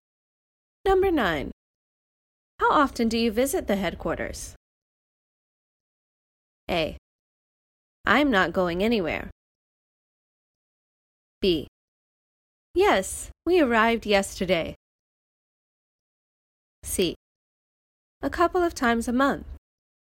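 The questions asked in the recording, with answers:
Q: How often do you visit the headquarters?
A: C: A couple of times a month.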